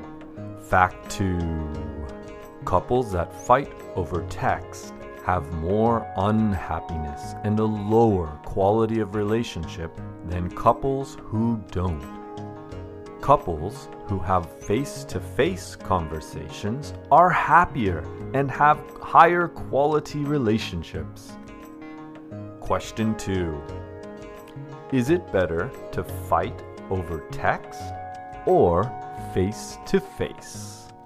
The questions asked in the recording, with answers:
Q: is it better to fight over text or face to face?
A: It's better to fight face to face.